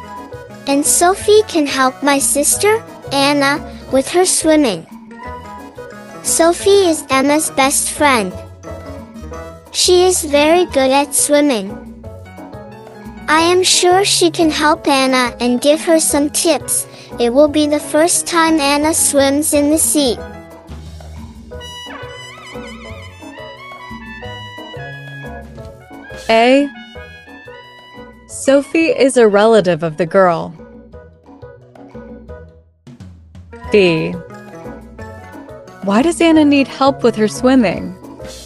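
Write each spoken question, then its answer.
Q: Sophie is a relative of the girl.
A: False; she is Emma's best friend

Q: Why does Anna need help with her swimming?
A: It will be her first time swimming in the sea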